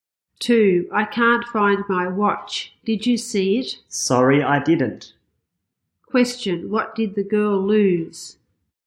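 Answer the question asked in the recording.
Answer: Her watch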